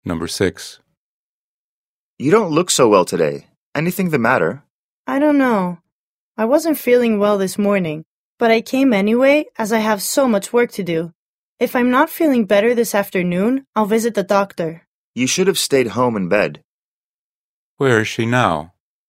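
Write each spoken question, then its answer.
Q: Where is she now?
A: At work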